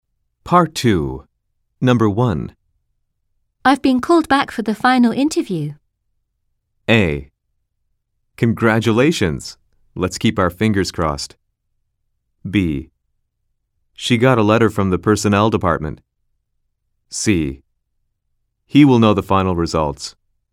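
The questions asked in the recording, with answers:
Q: I've been called back for the final interview.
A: A: Congratulations. Let's keep our fingers crossed.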